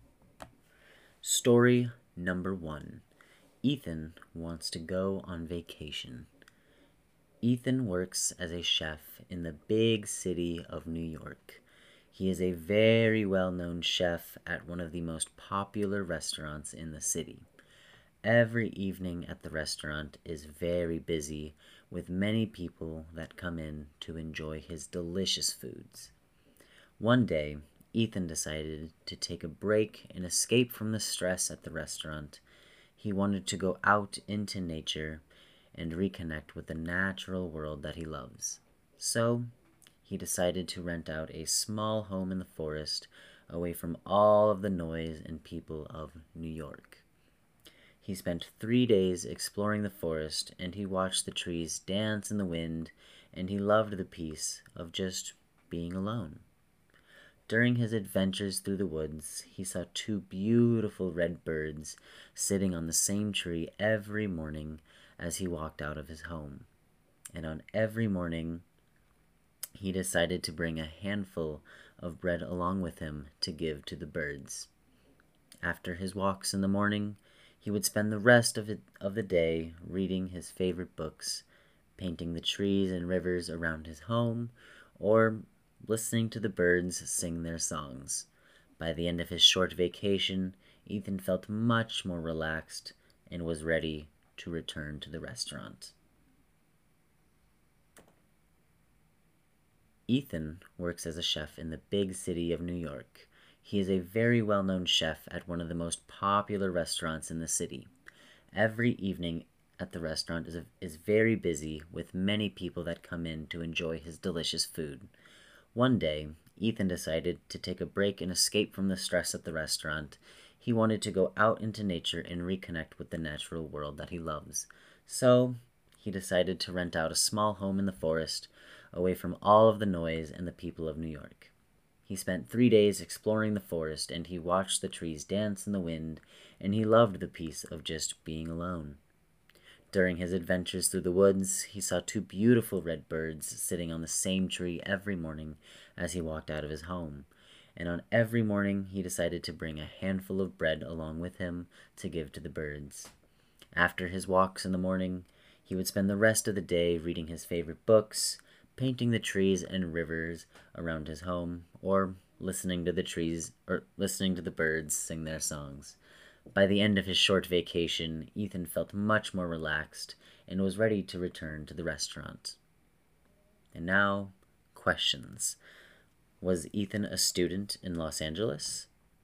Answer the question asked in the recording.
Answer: No, Ethan was not a student in Los Angeles.